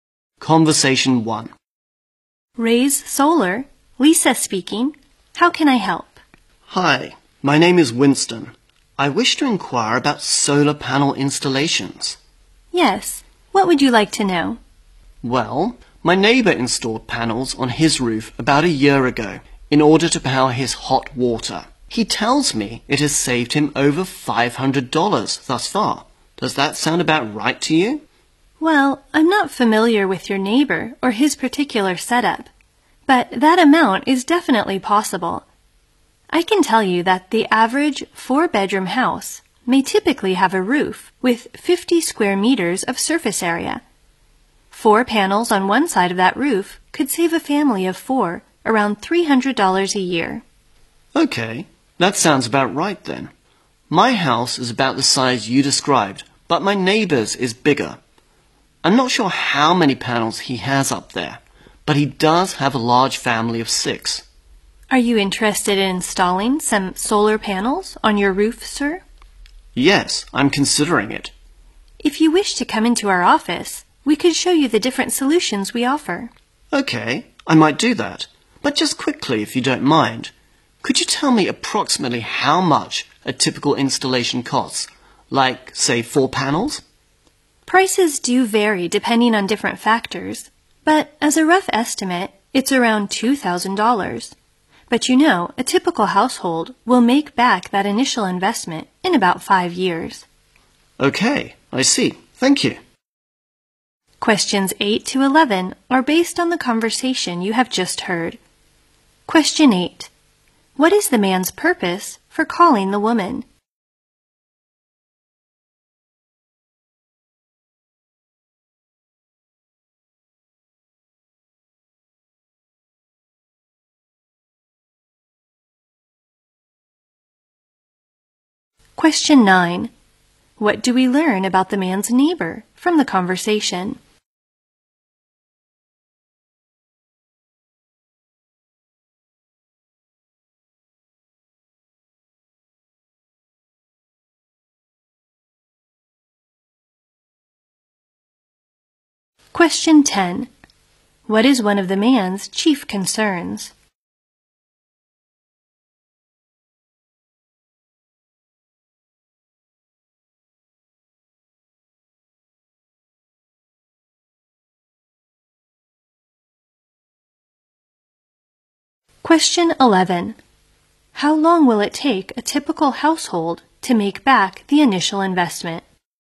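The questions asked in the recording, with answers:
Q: What is the man's purpose for calling the woman?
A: To ask about solar panel installation

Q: What is one of the man's chief concerns?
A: The cost of installation

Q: How long will it take a typical household to make back the initial investment?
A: About 5 years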